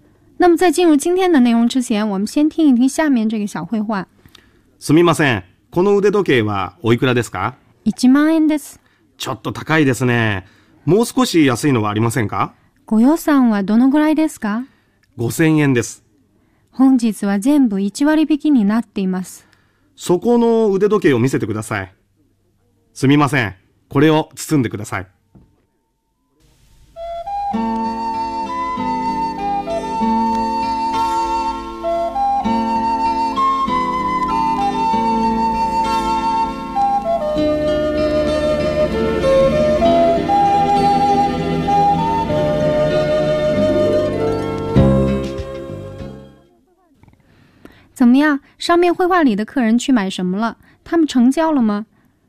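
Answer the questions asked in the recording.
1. 手表(腕時計)
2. 成交了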